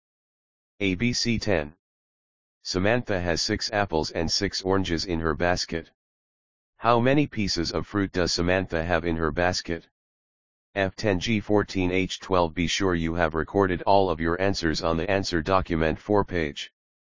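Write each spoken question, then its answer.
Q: How many pieces of fruit does Samantha have in her basket?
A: H: 12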